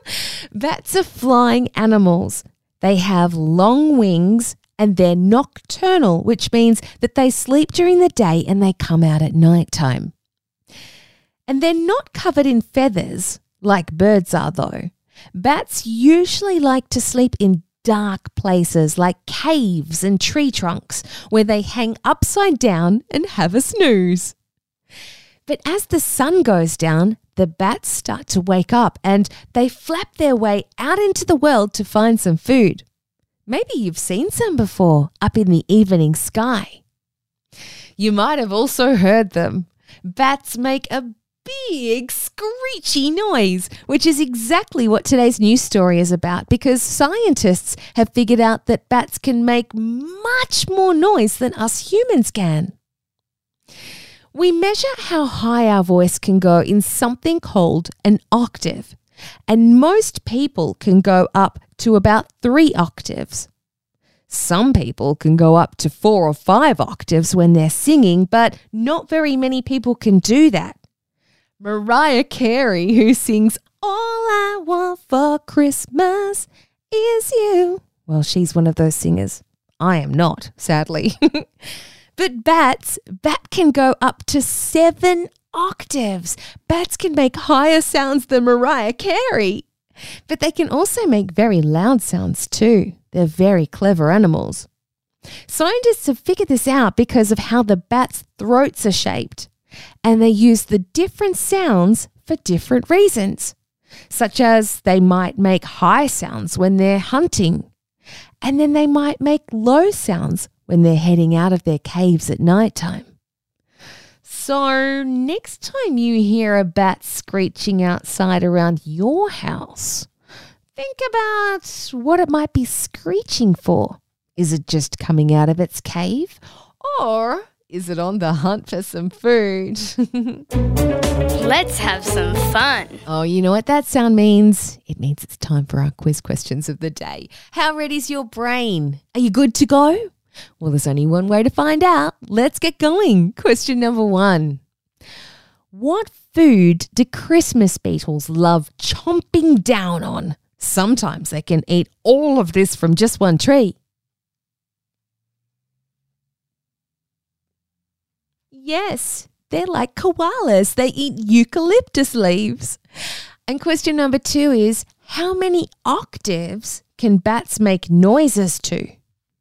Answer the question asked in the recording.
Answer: Those who said up to 7 octaves got the answer correct.